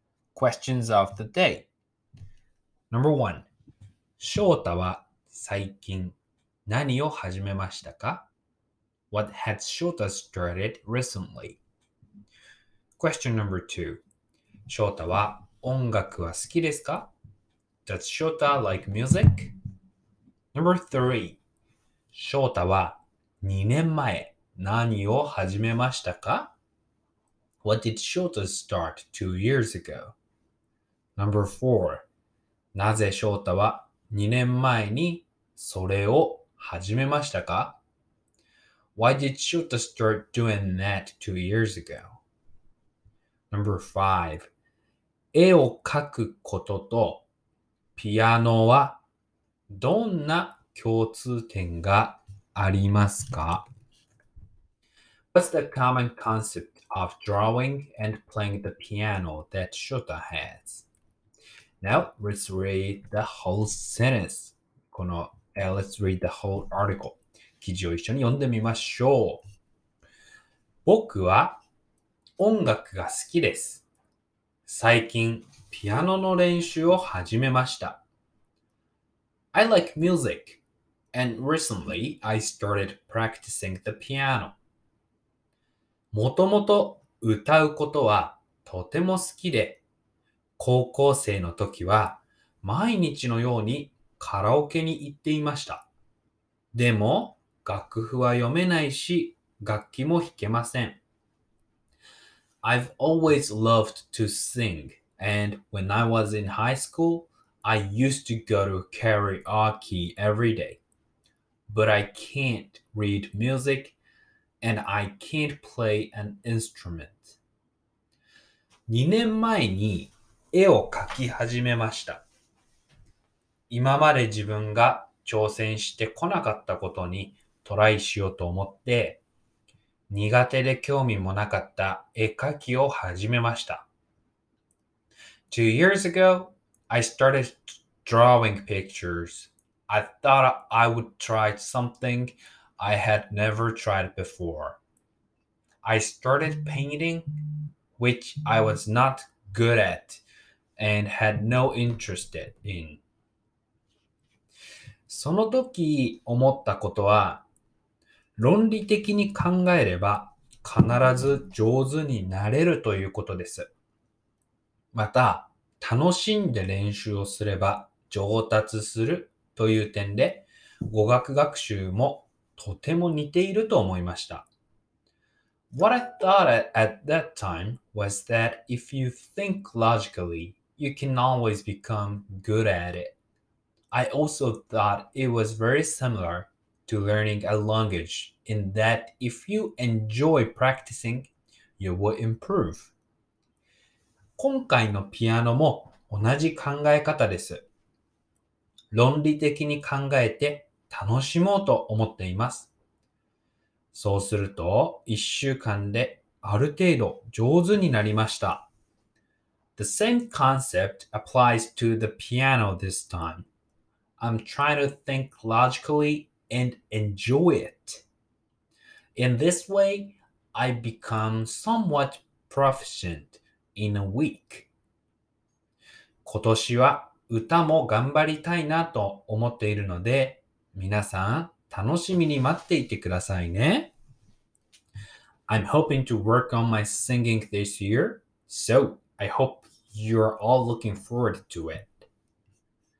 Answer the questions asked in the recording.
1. Yes, Shota recently started practicing the piano.
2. Yes, I love music.
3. 2年前は絵を描き始めました。
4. Because 今まで自分が挑戦してこなかったことにトライしたいと思ったからです。
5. これはですね、論理的に考えて楽しんで練習をする。そうすると、必ず上手になれます。